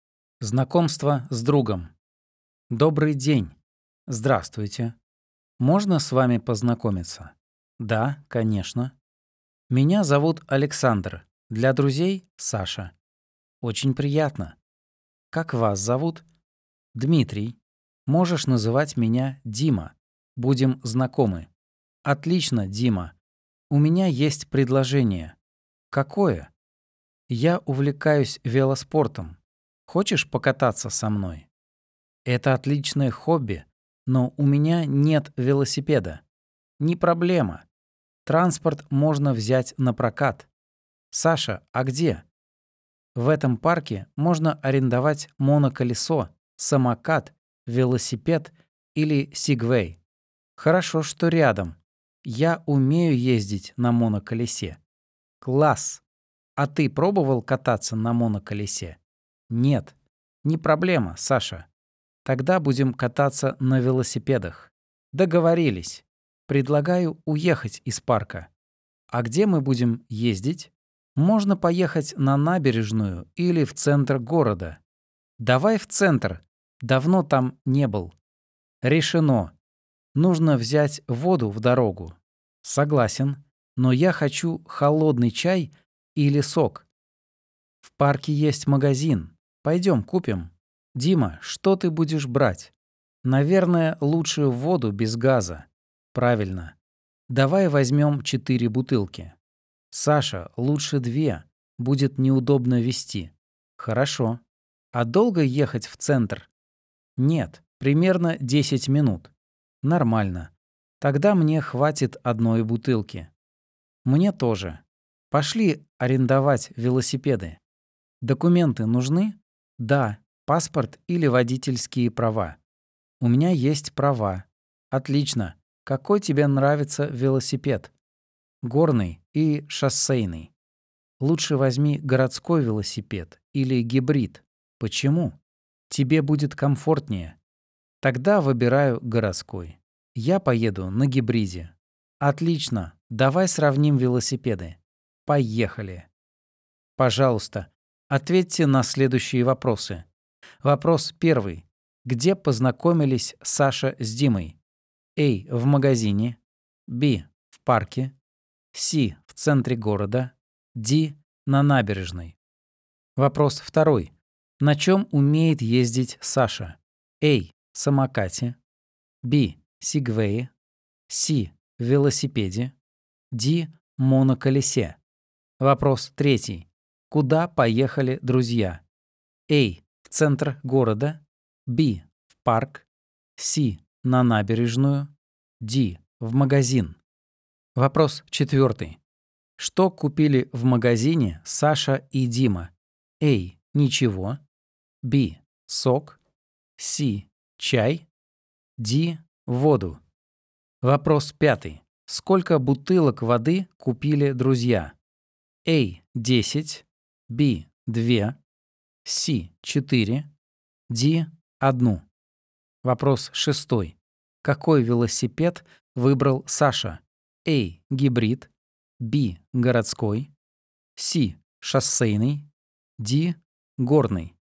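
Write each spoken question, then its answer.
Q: Где познакомились Саша с Димой?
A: B: В парке.

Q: Куда поехали друзья?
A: A: В центр города.

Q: Что купили в магазине Саша и Дима?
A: D: Воду.

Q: Сколько бутылок воды купили друзья?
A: B: 2.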